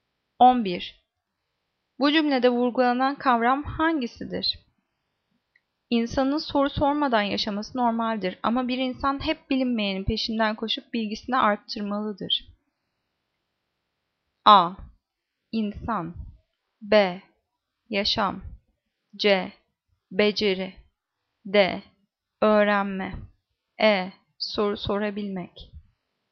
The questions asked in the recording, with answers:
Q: Bu cümlede vurgulanan kavram hangisidir?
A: Cevap D. Öğrenme.